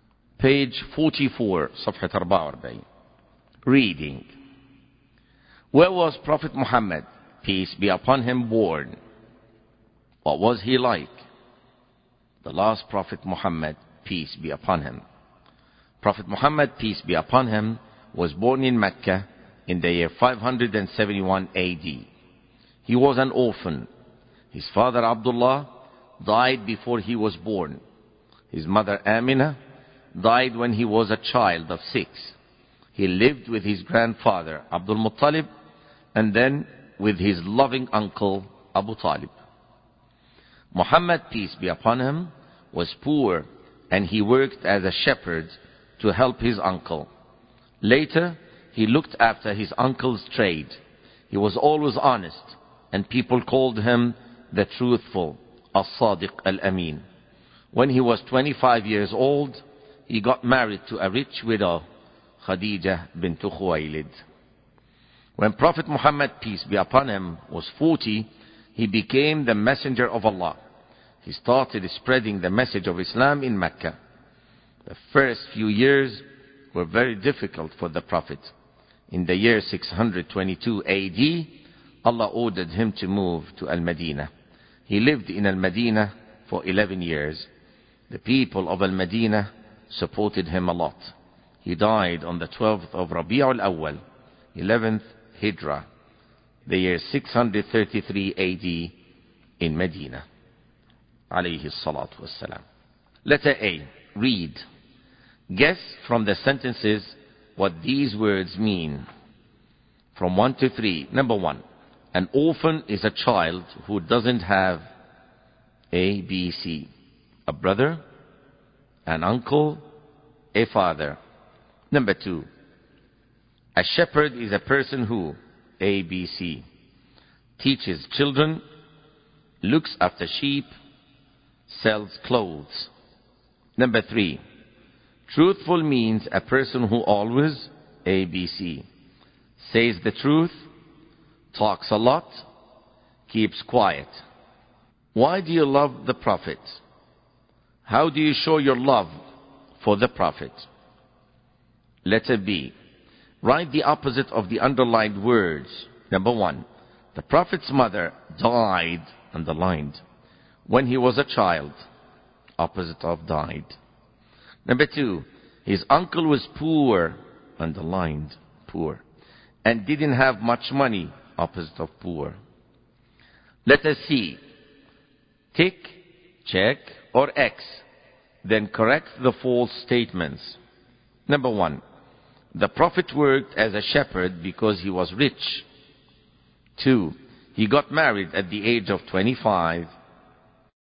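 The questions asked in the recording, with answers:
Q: A shepherd is a person who, A, B, C, teaches children, looks after sheep, sells clothes.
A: B: looks after sheep

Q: Truthful means a person who always, A, B, C, says the truth, talks a lot, keeps quiet.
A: A: says the truth

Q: the prophet worked as a shepherd because he was rich.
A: False: he worked as a shepherd because he was poor

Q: he got married at the age of 25.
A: True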